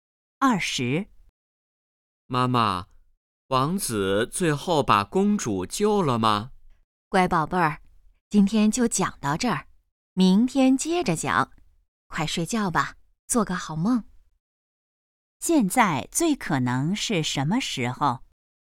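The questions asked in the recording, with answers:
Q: 现在最可能是什么时候?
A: 晚上睡觉前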